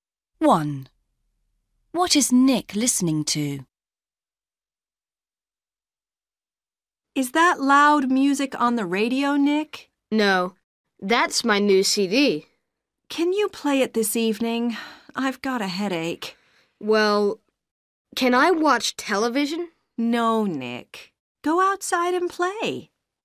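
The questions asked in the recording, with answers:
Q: What is Nick listening to?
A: His new CD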